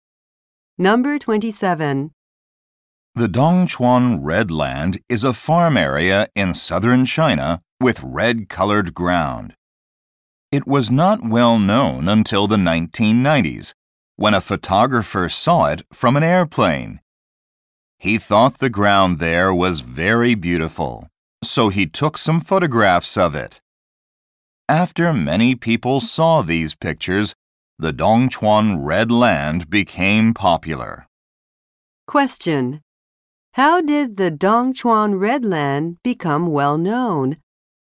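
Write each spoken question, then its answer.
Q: How did the Dongchuan Red Land become well known?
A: People saw a photographer's pictures of it taken from an airplane.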